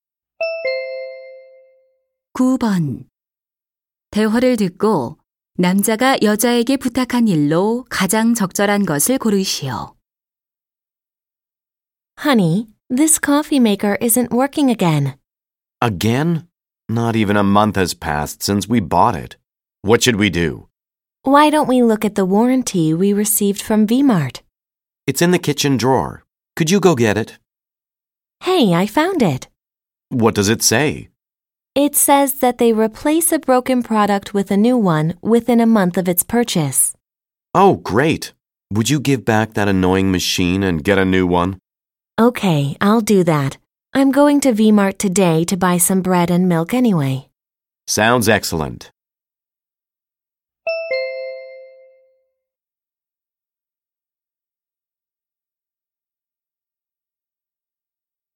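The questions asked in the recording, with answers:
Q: 대화를 듣고 남자가 여자에게 부탁한 일로 가장 적절한 것을 고르시오.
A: 고장 난 커피메이커를 새 것으로 교환해 오기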